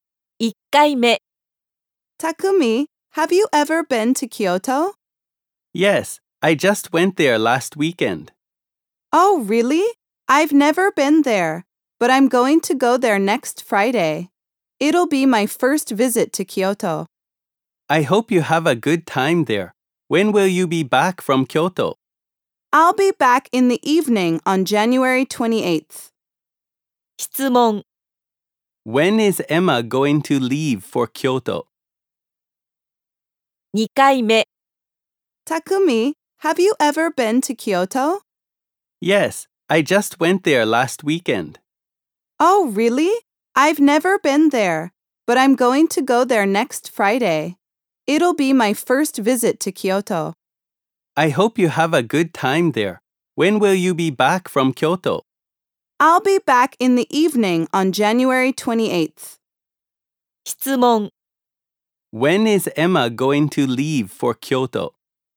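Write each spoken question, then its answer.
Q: When is Emma going to leave for Kyoto?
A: Next Friday.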